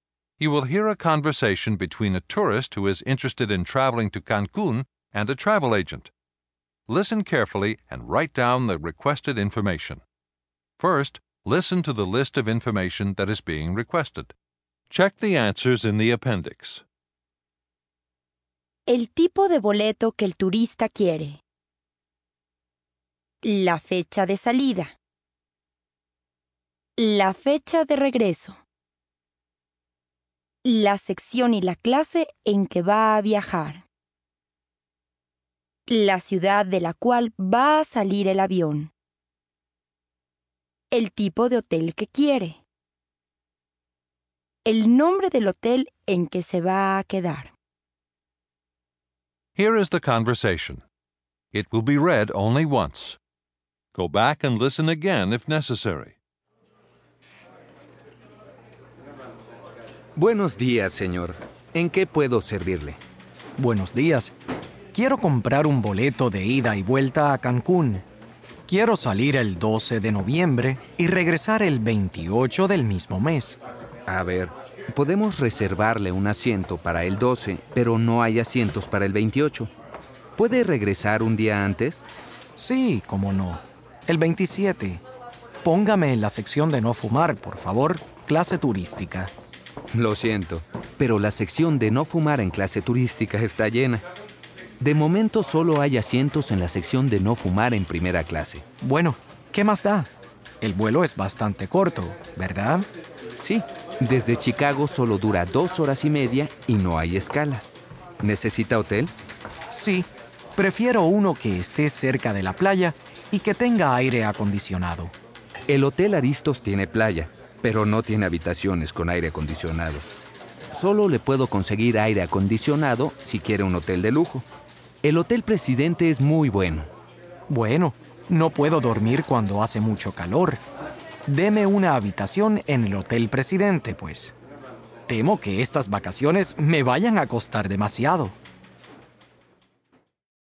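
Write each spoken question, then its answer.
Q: El tipo de boleto que el turista quiere.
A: de ida y vuelta

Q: La fecha de salida.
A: el 12 de noviembre

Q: La fecha de regreso.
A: el 27 de noviembre

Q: La sección y la clase en que va a viajar.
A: sección de no fumar, primera clase

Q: La ciudad de la cual va a salir el avión.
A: Chicago

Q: El tipo de hotel que quiere.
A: cerca de la playa y con aire acondicionado

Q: El nombre del hotel en que se va a quedar.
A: Hotel Presidente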